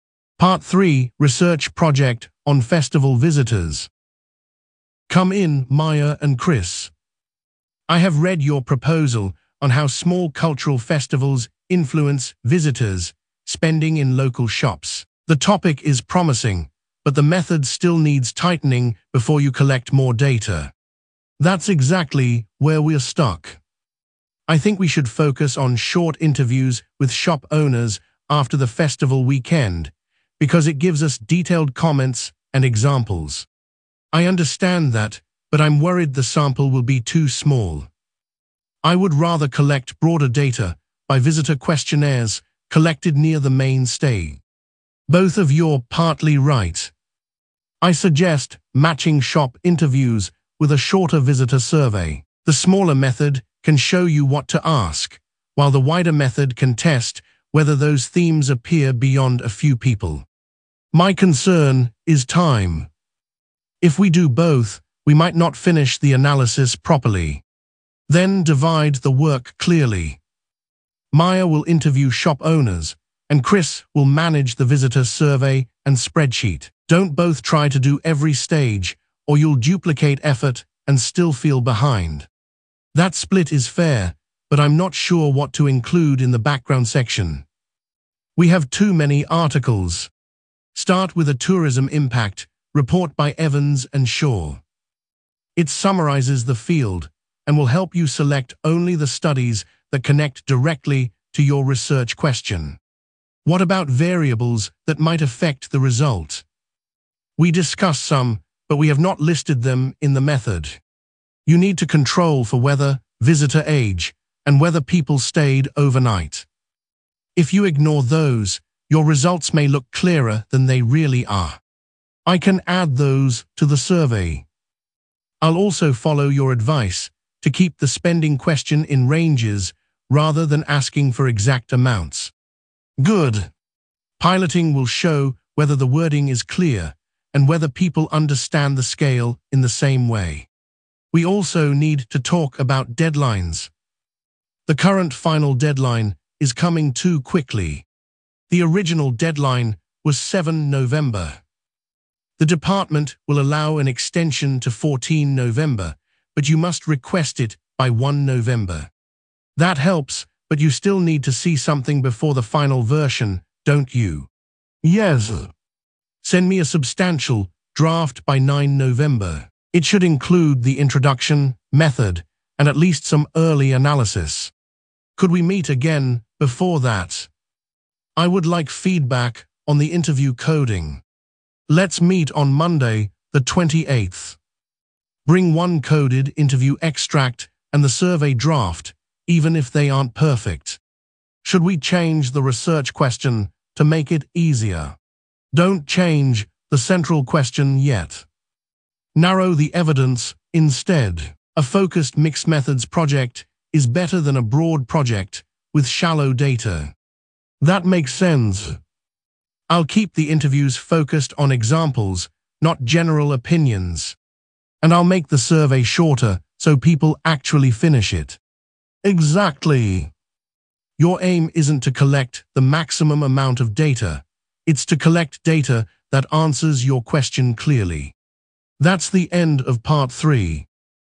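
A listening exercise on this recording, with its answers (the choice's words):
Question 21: What is the students' project about?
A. museum opening hours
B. how small cultural festivals influence visitors' spending in local shops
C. library seating plans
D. sports team performance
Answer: how small cultural festivals influence visitors' spending in local shops

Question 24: What does the tutor recommend?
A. using interviews only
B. changing the topic completely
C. postponing data collection until next term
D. matching shop interviews with a shorter visitor survey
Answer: matching shop interviews with a shorter visitor survey

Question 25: Which source does the tutor recommend for the background section?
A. an old newspaper column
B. a tourism impact report by Evans and Shaw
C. the university prospectus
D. a student blog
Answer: a tourism impact report by Evans and Shaw

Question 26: Which controls should the students include?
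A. room temperature only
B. the number of library books borrowed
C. weather, visitor age, and whether people stayed overnight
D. the tutor's timetable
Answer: weather, visitor age, and whether people stayed overnight

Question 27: What will Maya do?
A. Maya will interview shop owners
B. Chris will manage the visitor survey and spreadsheet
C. book the lecture theatre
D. write the final conclusion alone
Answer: Maya will interview shop owners

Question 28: What is the extended final deadline?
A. 7 November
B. 1 November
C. 9 November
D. 14 November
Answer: 14 November

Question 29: When must the students send a substantial draft?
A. Monday the 28th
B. 9 November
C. 1 November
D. 7 November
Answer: 9 November

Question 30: What practical advice does the tutor give about the data collection tool?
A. make every question open-ended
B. avoid piloting anything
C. keep the spending question in ranges rather than asking for exact amounts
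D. collect as much data as possible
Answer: keep the spending question in ranges rather than asking for exact amounts

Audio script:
Part 3: Research Project on Festival Visitors
Rowan: Come in, Maya and Chris. I have read your proposal on how small cultural festivals influence visitors' spending in local shops. The topic is promising, but the method still needs tightening before you collect more data.
Maya: That is exactly where we are stuck. I think we should focus on short interviews with shop owners after the festival weekend because it gives us detailed comments and examples.
Chris: I understand that, but I am worried the sample will be too small. I would rather collect broader data by visitor questionnaires collected near the main stage.
Rowan: Both of you are partly right. I suggest matching shop interviews with a shorter visitor survey. The smaller method can show you what to ask, while the wider method can test whether those themes appear beyond a few people.
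Maya: My concern is time. If we do both, we might not finish the analysis properly.
Rowan: Then divide the work clearly. Maya will interview shop owners, and Chris will manage the visitor survey and spreadsheet. Do not both try to do every stage, or you will duplicate effort and still feel behind.
Chris: That split is fair, but I am not sure what to include in the background section. We have too many articles.
Rowan: Start with a tourism impact report by Evans and Shaw. It summarises the field and will help you select only the studies that connect directly to your research question.
Maya: What about variables that might affect the result? We discussed some, but we have not listed them in the method.
Rowan: You need to control for weather, visitor age, and whether people stayed overnight. If you ignore those, your results may look clearer than they really are.
Chris: I can add those to the survey. 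I will also follow your advice to keep the spending question in ranges rather than asking for exact amounts.
Rowan: Good. Piloting will show whether the wording is clear and whether people understand the scale in the same way.
Maya: We also need to talk about deadlines. The current final deadline is coming too quickly.
Rowan: The original deadline was 7 November. The department will allow an extension to 14 November, but you must request it by 1 November.
Chris: That helps, but you still need to see something before the final version, don't you?
Rowan: Yes. Send me a substantial draft by 9 November. It should include the introduction, method, and at least some early analysis.
Maya: Could we meet again before that? I would like feedback on the interview coding.
Rowan: Let's meet on Monday the 28th. Bring one coded interview extract and the survey draft, even if they are not perfect.
Chris: Should we change the research question to make it easier?
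Rowan: Do not change the central question yet. Narrow the evidence instead. A focused mixed-methods project is better than a broad project with shallow data.
Maya: That makes sense. I will keep the interviews focused on examples, not general opinions.
Chris: And I will make the survey shorter so people actually finish it.
Rowan: Exactly. Your aim is not to collect the maximum amount of data; it is to collect data that answers your question clearly.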